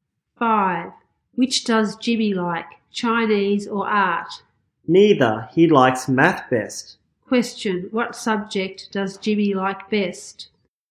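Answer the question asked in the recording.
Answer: Math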